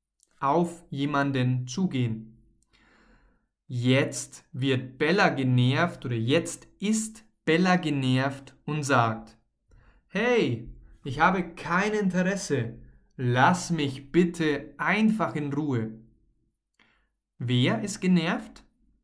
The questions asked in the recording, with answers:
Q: Wer ist genervt?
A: Bella. Bella ist genervt.